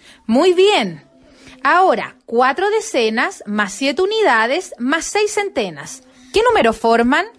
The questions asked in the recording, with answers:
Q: ¿Qué número forman?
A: 647.